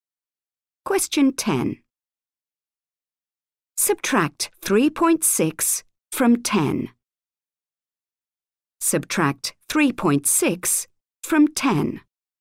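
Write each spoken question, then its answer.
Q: Subtract 3.6 from 10.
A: 6.4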